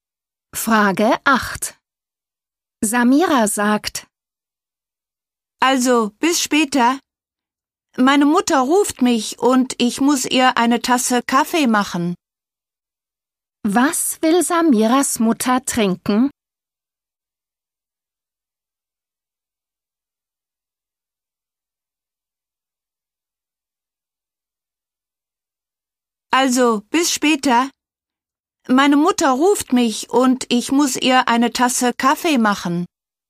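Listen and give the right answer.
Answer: Kaffee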